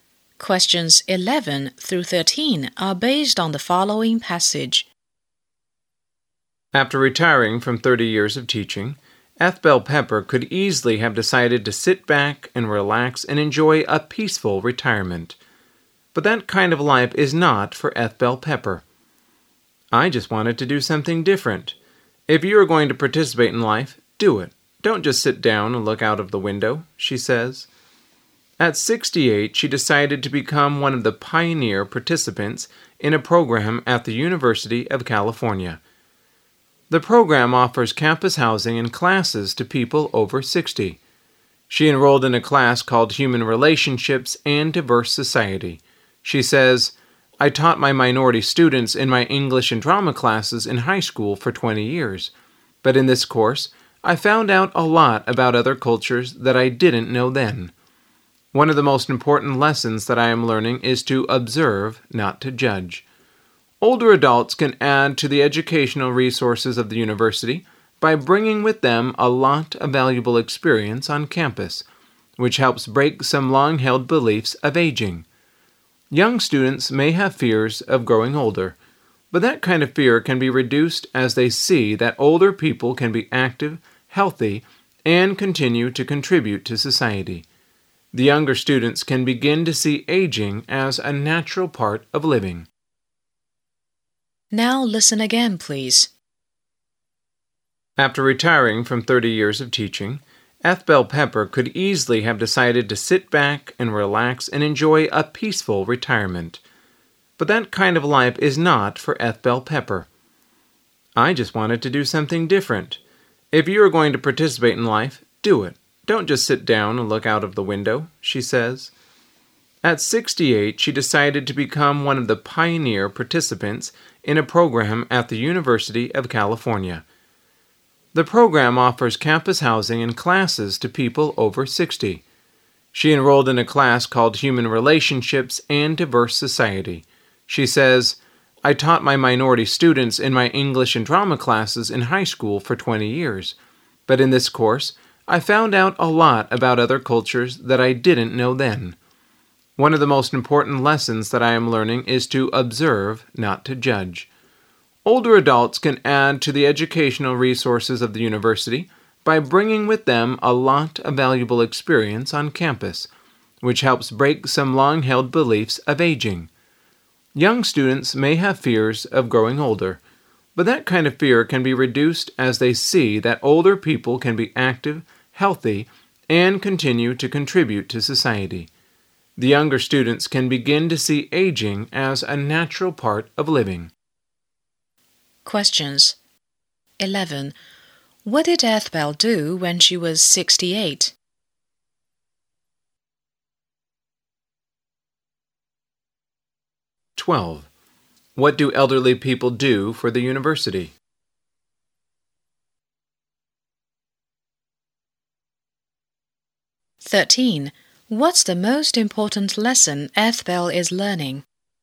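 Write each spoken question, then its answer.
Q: What did Eth Bell do when she was 68?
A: She joined a University of California program for people over 60 and took classes there.

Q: What do elderly people do for the university?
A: They bring valuable experience that adds to its educational resources.

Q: What's the most important lesson Eth Bell is learning?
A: To observe, not to judge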